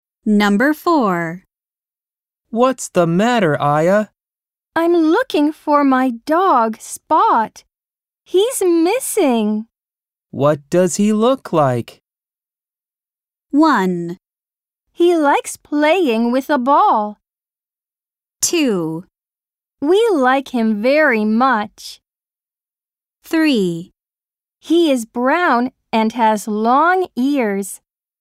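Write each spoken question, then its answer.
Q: What does he look like?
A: 3: He is brown and has long ears.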